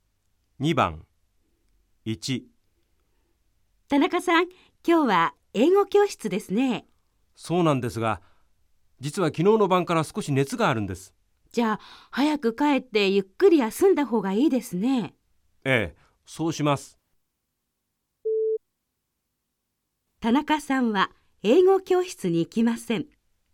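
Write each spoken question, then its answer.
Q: 田中さんは英語教室に行きません。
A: ○(正しい)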